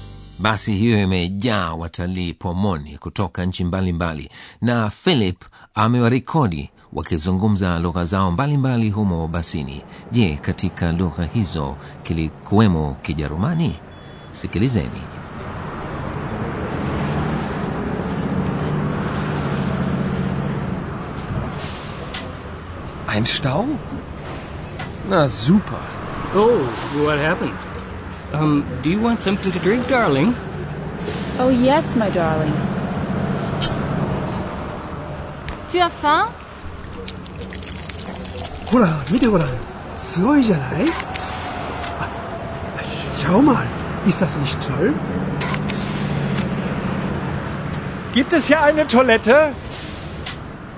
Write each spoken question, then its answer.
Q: Je, katika lugha hizo kilikuwemo Kijerumani?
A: sina shaka mlisikia mtu akiuliza kwa kijerumani kama humo mna choo gibt es hier eine toilette